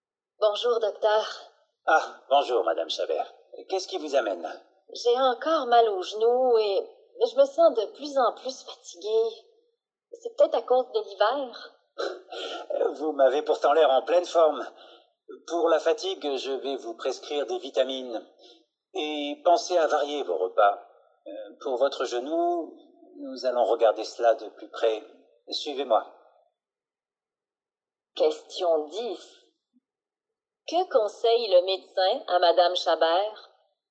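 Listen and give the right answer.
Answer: De prendre des vitamines et de varier ses repas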